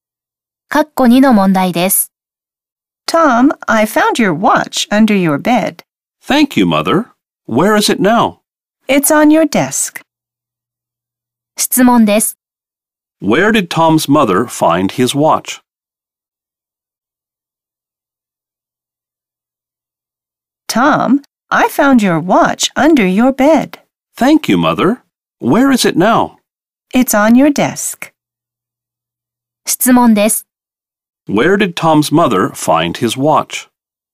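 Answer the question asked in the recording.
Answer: Under his bed.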